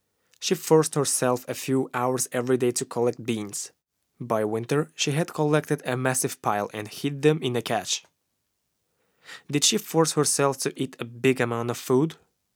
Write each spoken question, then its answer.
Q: Did she force herself to eat a big amount of food?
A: No, she didn't force herself to eat amount of food.